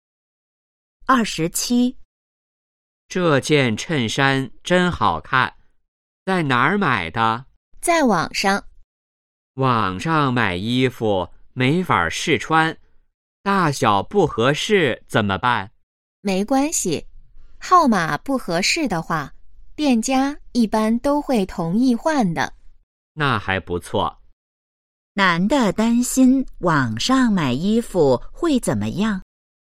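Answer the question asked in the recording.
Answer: 没法试穿,大小可能不合适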